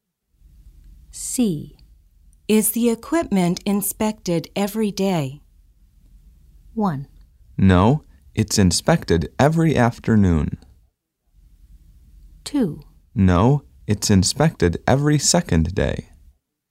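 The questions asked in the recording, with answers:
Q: Is the equipment inspected every day?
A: 2: No, it's inspected every second day.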